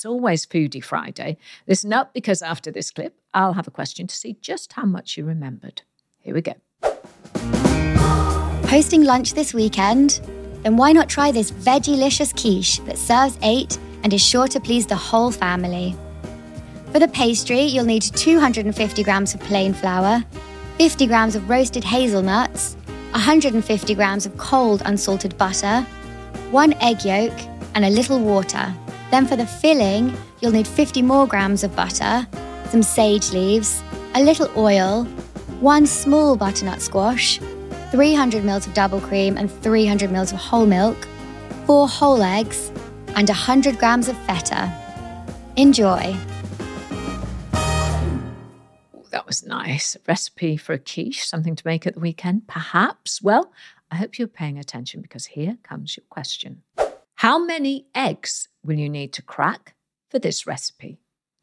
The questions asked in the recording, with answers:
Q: How many eggs will you need to crack for this recipe?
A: Well, the recipe requires 4 eggs and 1 egg yolk, so the answer I was looking for is 5 eggs.